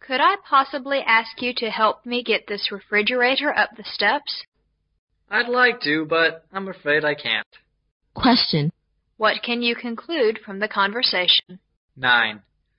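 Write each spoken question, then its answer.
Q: What can you conclude from the conversation?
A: The woman can't help move the refrigerator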